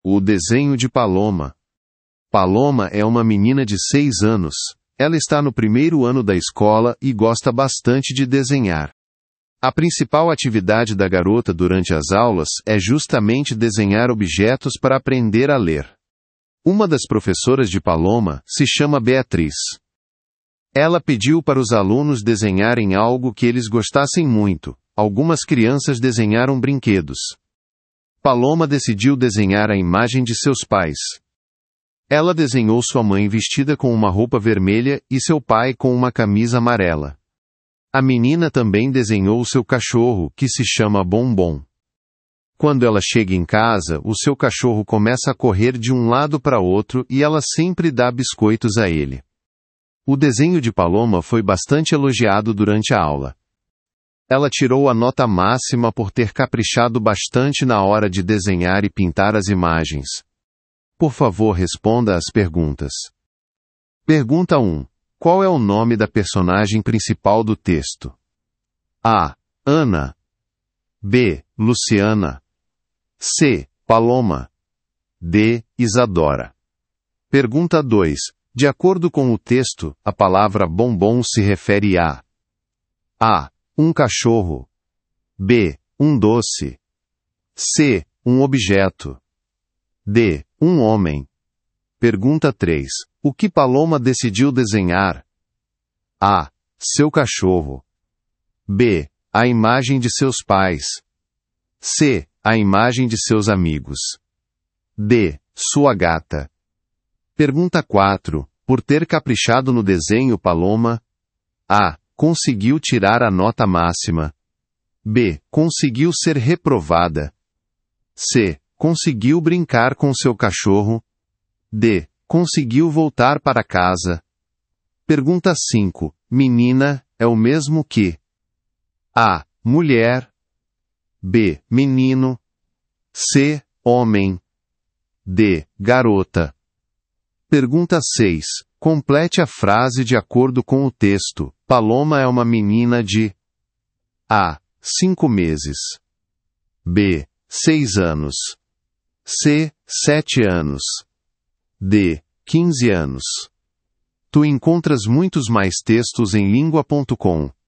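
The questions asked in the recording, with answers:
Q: Qual é o nome da personagem principal do texto?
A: C: Paloma

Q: De acordo com o texto, a palavra bombom se refere a...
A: A: Um cachorro

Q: O que Paloma decidiu desenhar?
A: B: A imagem de seus pais

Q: Por ter caprichado no desenho, Paloma?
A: A: Conseguiu tirar a nota máxima

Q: Menina é o mesmo que?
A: D: Garota

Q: Complete a frase de acordo com o texto. Paloma é uma menina de...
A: B: 6 anos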